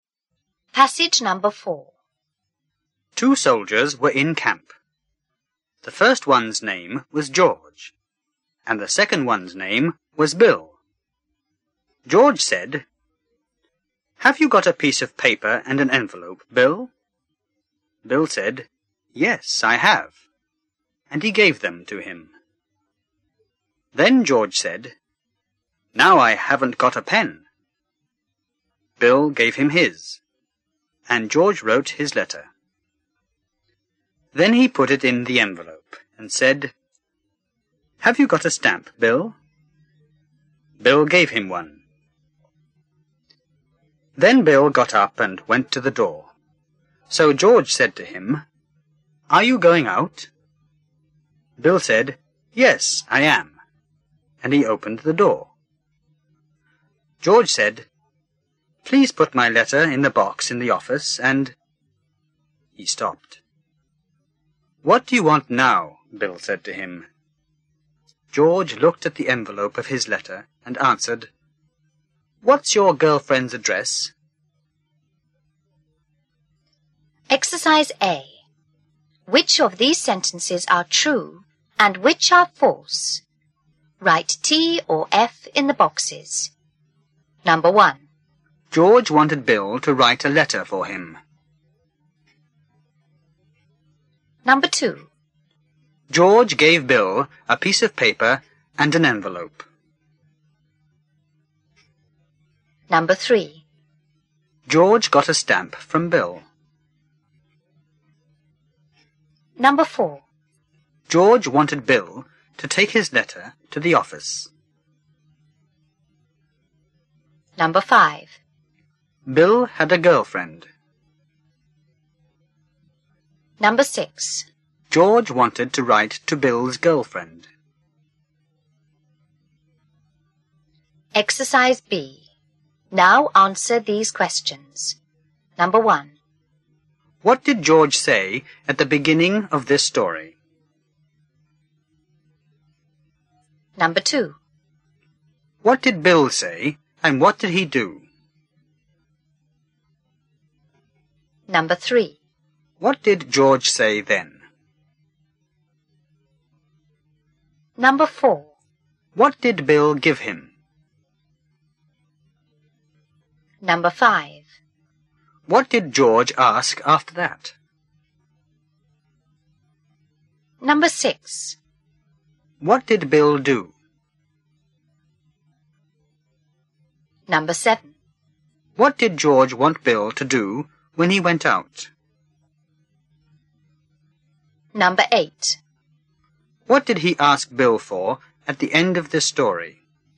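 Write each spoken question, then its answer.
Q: What did George say at the beginning of this story?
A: Have you got a piece of paper and an envelope, Bill?

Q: What did Bill say and what did he do?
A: He said "Yes, I have" and gave them to him.

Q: What did George say then?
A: Now I haven't got a pen.

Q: What did Bill give him?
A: His pen.

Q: What did George ask after that?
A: Have you got a stamp, Bill?

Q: What did George want Bill to do when he went out?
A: Put his letter in the box in the office.

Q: What did he ask Bill for at the end of this story?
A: His girlfriend's address.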